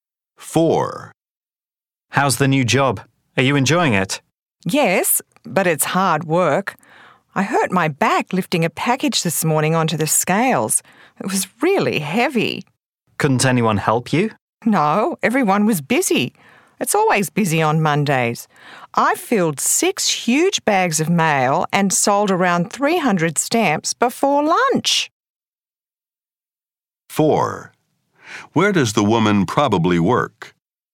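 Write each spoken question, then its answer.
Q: Where does the woman probably work?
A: At a post office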